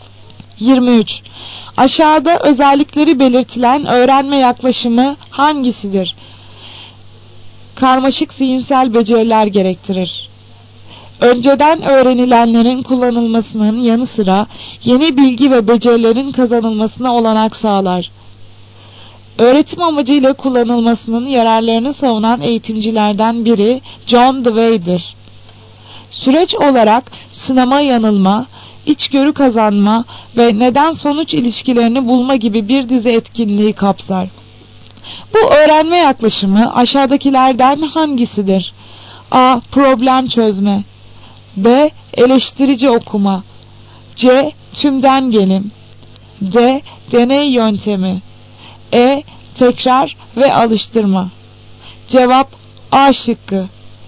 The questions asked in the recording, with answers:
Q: Bu öğrenme yaklaşımı aşağıdakilerden hangisidir?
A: Cevap A şıkkı. Problem çözme.